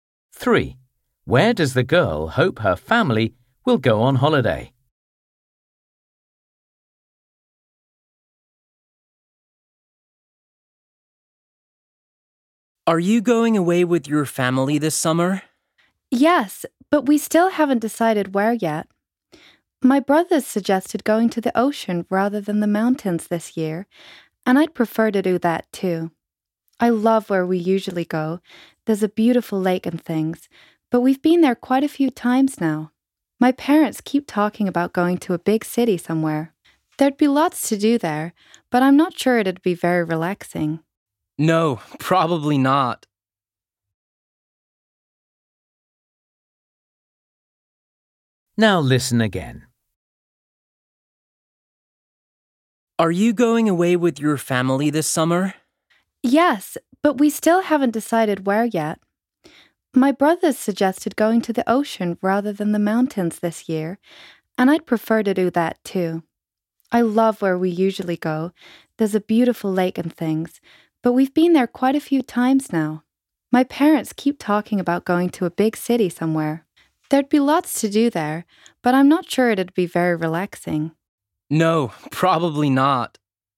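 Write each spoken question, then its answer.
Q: Where does the girl hope her family will go on holiday?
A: the ocean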